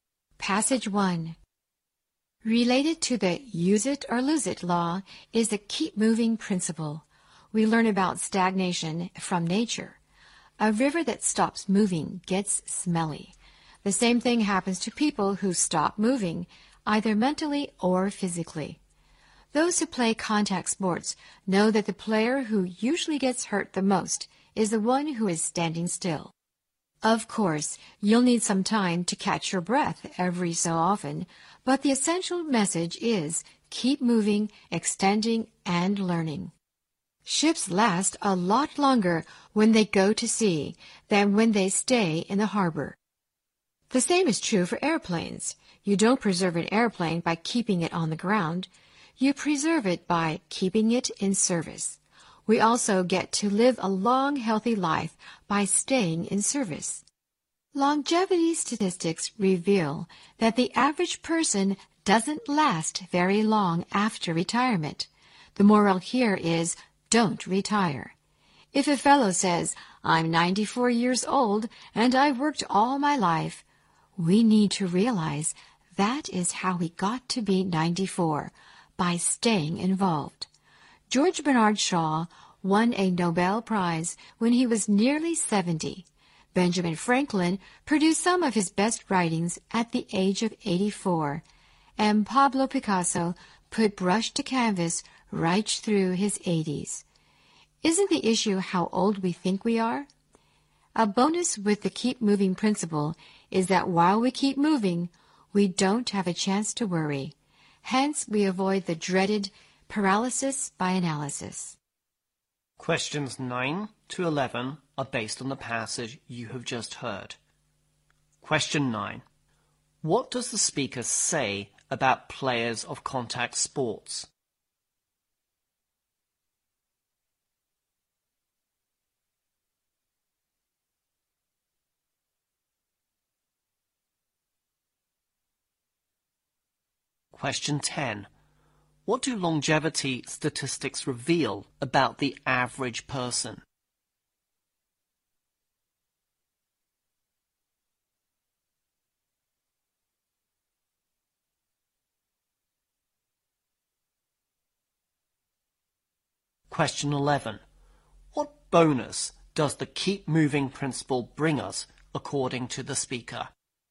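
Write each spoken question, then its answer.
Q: What does the speaker say about players of contact sports?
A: The one standing still usually gets hurt the most

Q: What do longevity statistics reveal about the average person?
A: They don't last very long after retirement

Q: What bonus does the keep moving principle bring us, according to the speaker?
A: We don't have a chance to worry, avoiding paralysis by analysis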